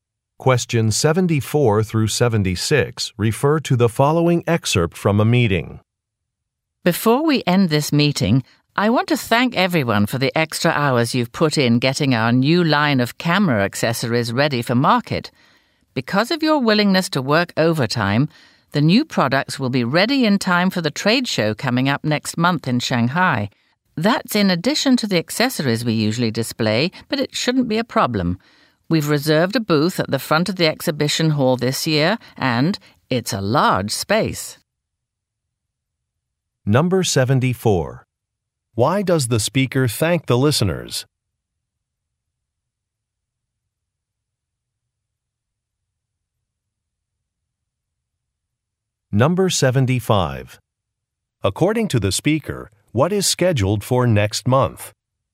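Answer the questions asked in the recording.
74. For working overtime
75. A trade show in Shanghai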